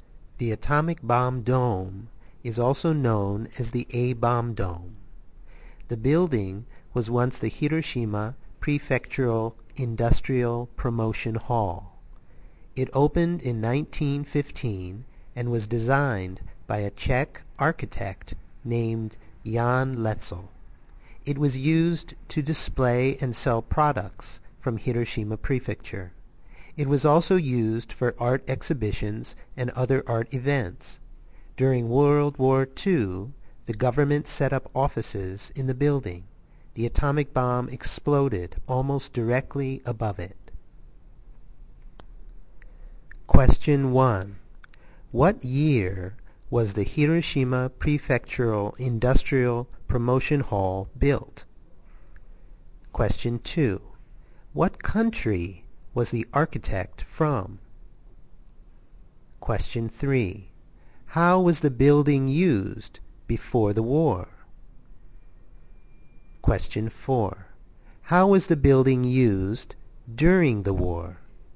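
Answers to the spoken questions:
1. 1915
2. Czech Republic (Czech)
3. To display and sell products from Hiroshima Prefecture, and for art exhibitions and events
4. The government set up offices in it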